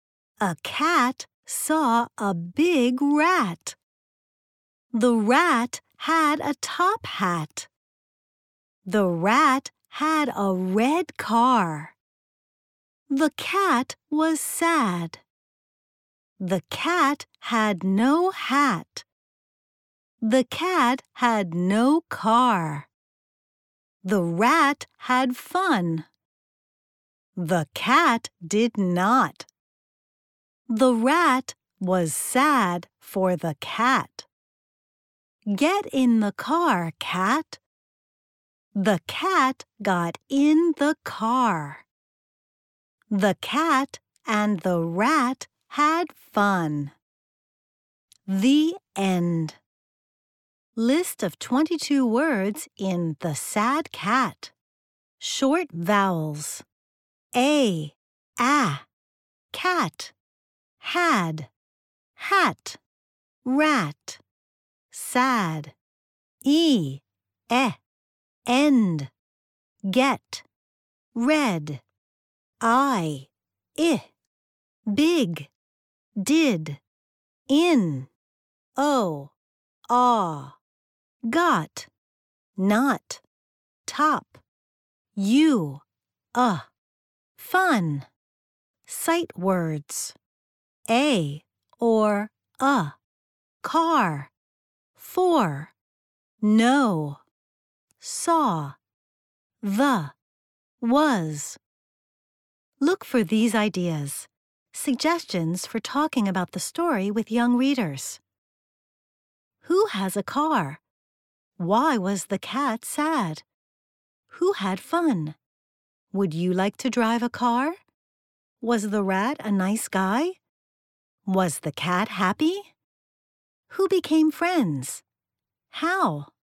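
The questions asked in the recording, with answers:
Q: Who has a car?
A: The rat

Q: Why was the cat sad?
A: The cat had no hat and no car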